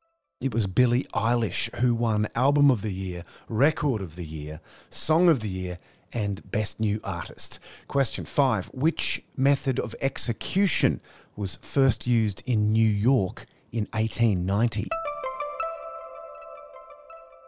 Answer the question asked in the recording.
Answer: The electric chair.